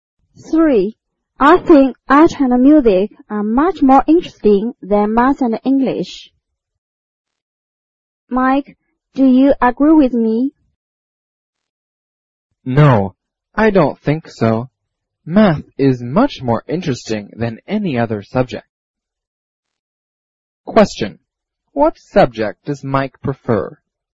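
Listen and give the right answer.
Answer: Math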